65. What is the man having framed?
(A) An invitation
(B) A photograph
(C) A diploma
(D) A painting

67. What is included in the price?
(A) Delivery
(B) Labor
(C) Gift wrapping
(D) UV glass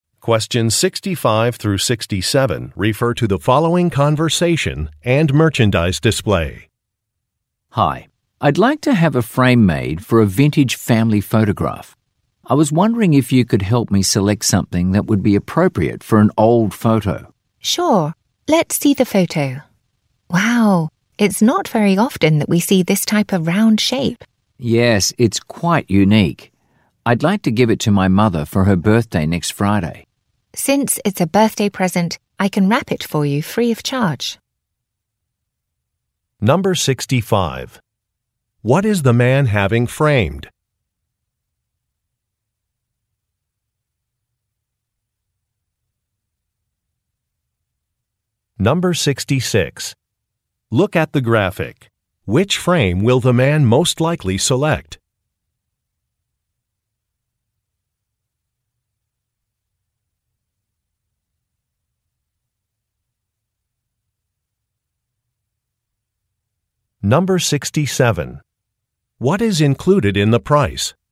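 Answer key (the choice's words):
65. A photograph
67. Gift wrapping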